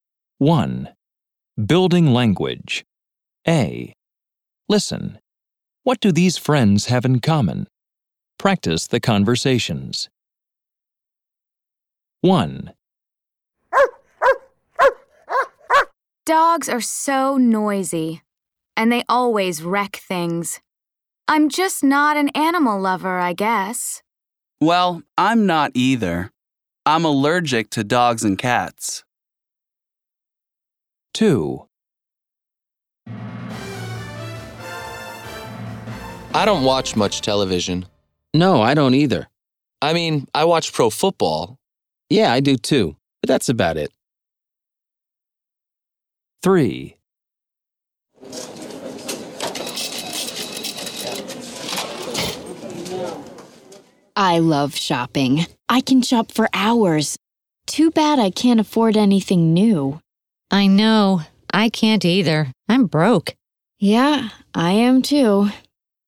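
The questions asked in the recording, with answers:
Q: What do these friends have in common?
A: Neither of them is an animal lover.

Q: What do these friends have in common?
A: They don't watch much TV, only pro football.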